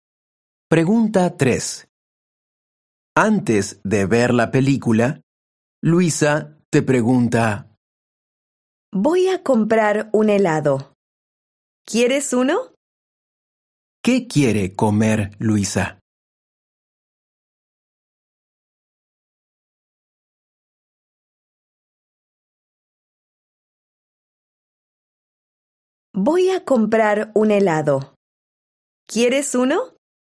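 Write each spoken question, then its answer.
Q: ¿Qué quiere comer Luisa?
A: un helado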